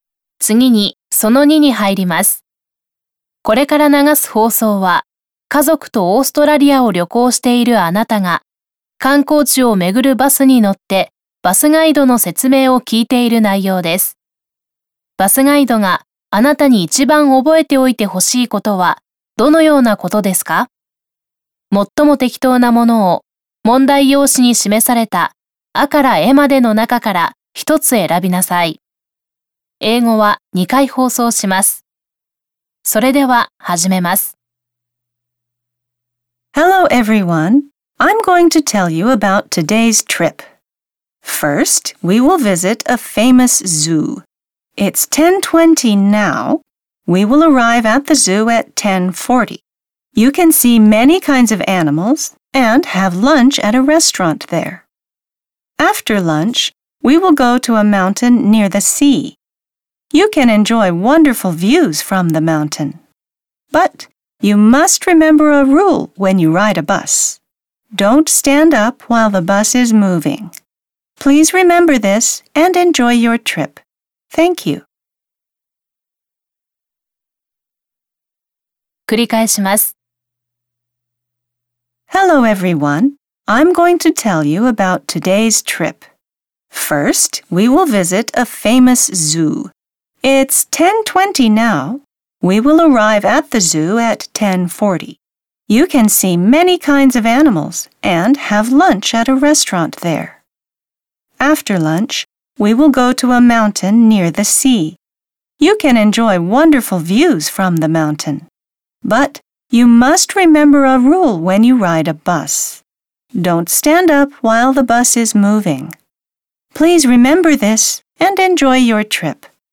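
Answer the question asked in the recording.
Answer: バスが動いている間は立ち上がらないこと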